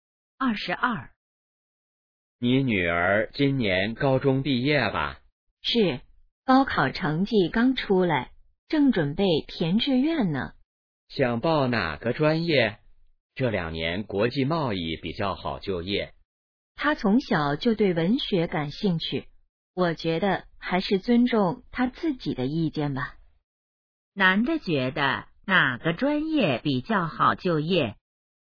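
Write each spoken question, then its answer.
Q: 男的觉得哪个专业比较好就业?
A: 国际贸易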